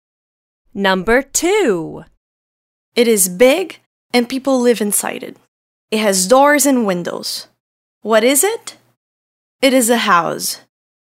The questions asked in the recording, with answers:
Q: What is it?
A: It is a house.